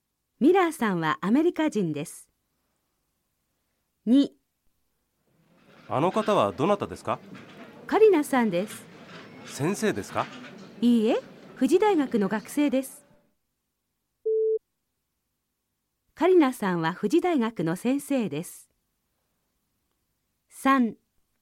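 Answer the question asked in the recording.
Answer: ×(学生です)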